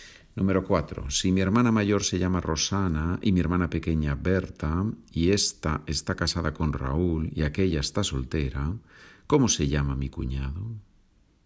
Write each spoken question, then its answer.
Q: Si mi hermana mayor se llama Rosana y mi hermana pequeña Berta y esta está casada con Raúl y aquella está soltera, ¿cómo se llama mi cuñado?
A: Mi cuñado se llama Raúl.